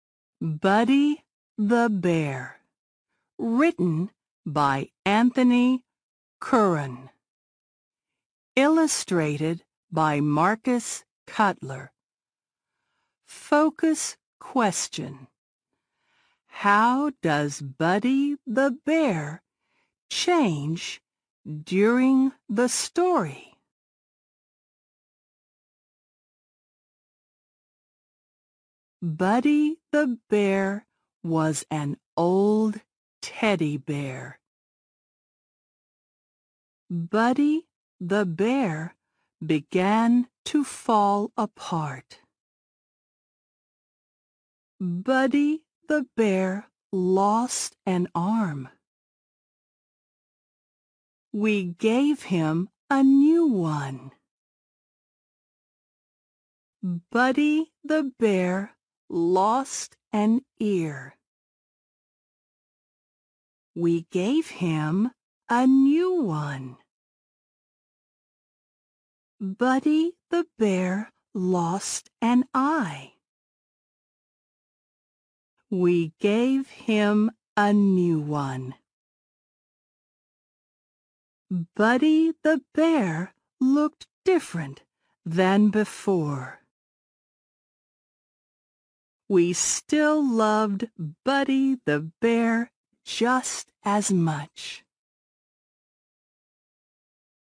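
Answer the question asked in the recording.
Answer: He falls apart, losing an arm, an ear and an eye, and gets new ones, so he looks different than before.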